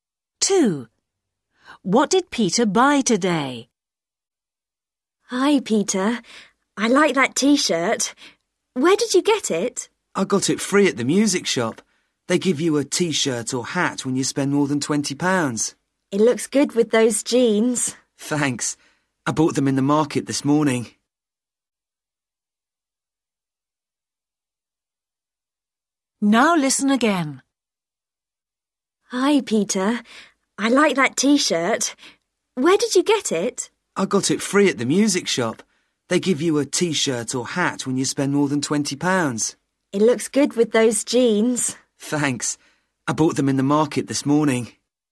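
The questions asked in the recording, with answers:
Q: What did Peter buy today?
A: Jeans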